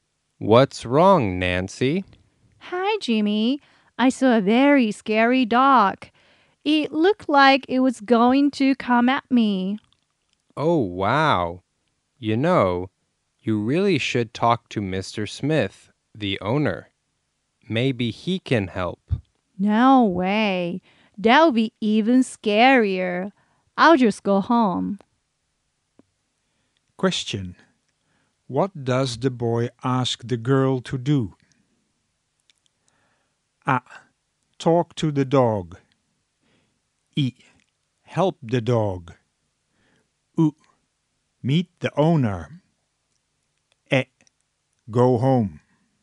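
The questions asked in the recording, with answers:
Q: What does the boy ask the girl to do?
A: う: Meet the owner.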